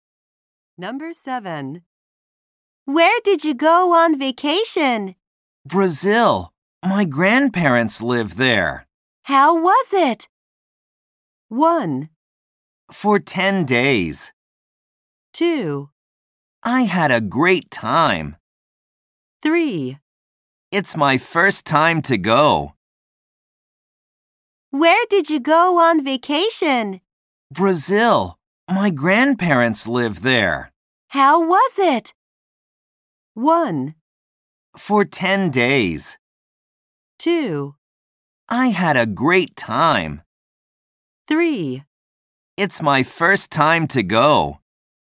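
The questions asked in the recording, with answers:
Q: How was it?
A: 2: I had a great time.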